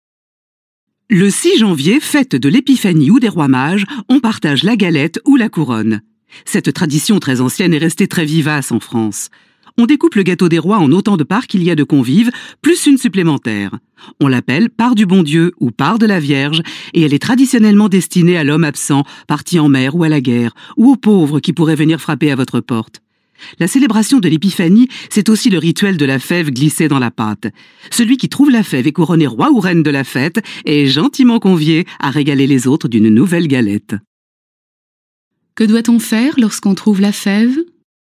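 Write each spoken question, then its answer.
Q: Que doit-on faire lorsqu'on trouve la fève ?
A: On est couronné roi ou reine et on offre une nouvelle galette aux autres.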